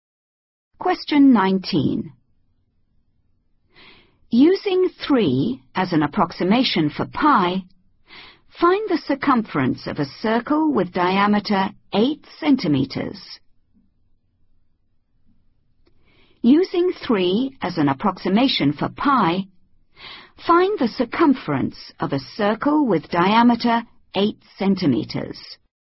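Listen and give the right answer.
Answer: 24 cm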